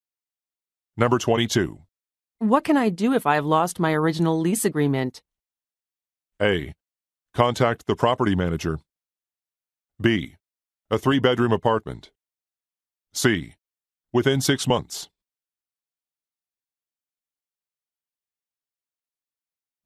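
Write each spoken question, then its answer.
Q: What can I do if I've lost my original lease agreement?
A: A: Contact the property manager.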